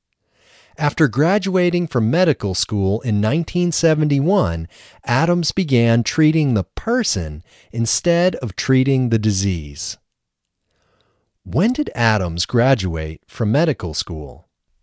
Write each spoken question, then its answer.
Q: When did Adams graduate from medical school?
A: Adams graduated from medical school in 1971.